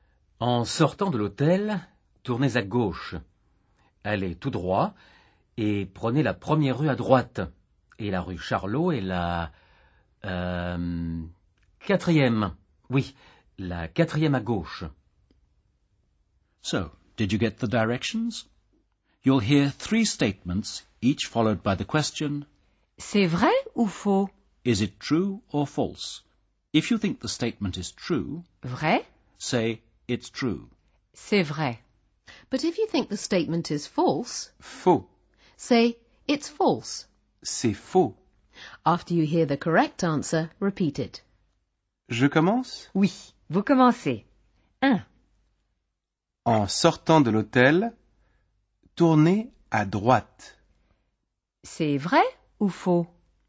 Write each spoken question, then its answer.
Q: En sortant de l'hôtel, tournez à droite. C'est vrai ou faux?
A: C'est faux. En sortant de l'hôtel... Tournez à gauche.